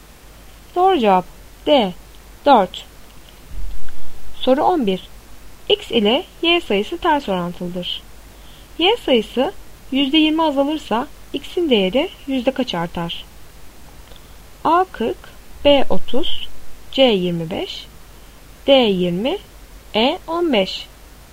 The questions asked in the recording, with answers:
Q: Y sayısı %20 azalırsa X'in değeri yüzde kaç artar?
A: Doğru cevap C 25.